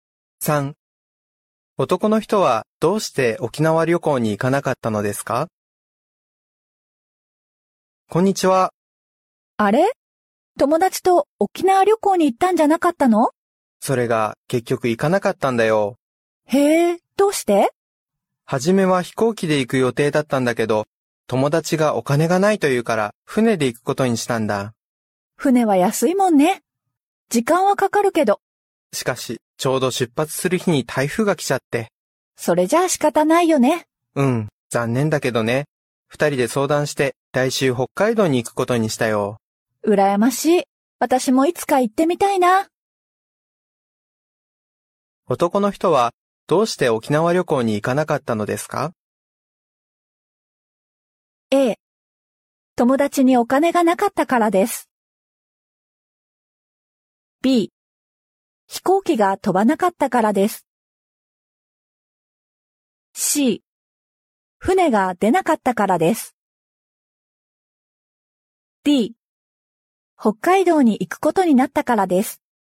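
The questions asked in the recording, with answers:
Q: 男の人はどうして沖縄旅行に行かなかったのですか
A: C 船が出なかったからです。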